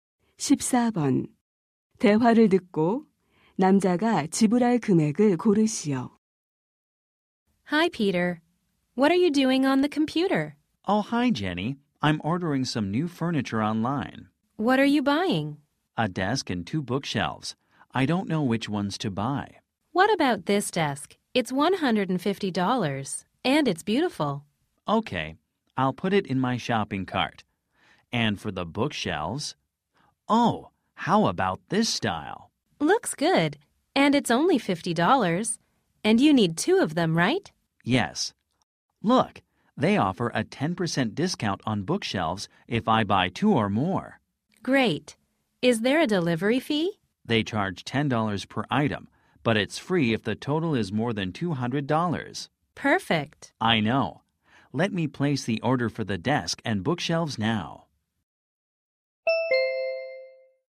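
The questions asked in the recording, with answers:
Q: 대화를 듣고 남자가 지불할 금액을 고르시오.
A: $240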